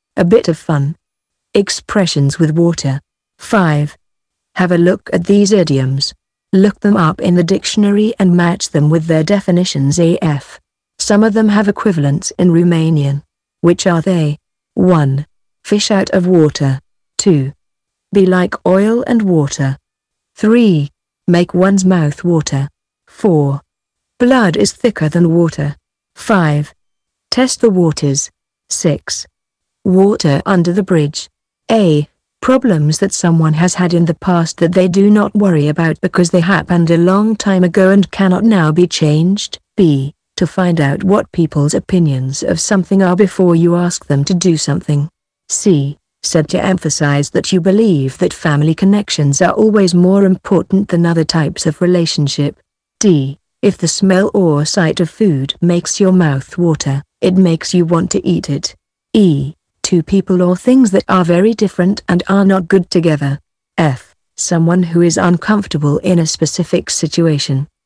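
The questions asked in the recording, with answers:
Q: Fish out of water.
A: F: Someone who is uncomfortable in a specific situation.

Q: Be like oil and water.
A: E: Two people or things that are very different and are not good together.

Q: Make one's mouth water.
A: D: If the smell or sight of food makes your mouth water, it makes you want to eat it.

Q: Blood is thicker than water.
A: C: Said to emphasize that you believe that family connections are always more important than other types of relationship.

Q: Test the waters.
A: B: To find out what people's opinions of something are before you ask them to do something.

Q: Water under the bridge.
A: A: Problems that someone has had in the past that they do not worry about because they happened a long time ago and cannot now be changed.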